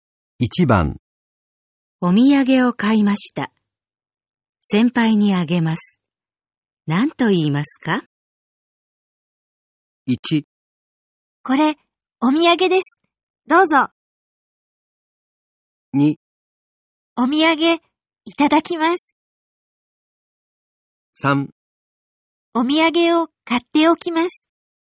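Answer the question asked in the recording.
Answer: 1: これ、お土産です。どうぞ。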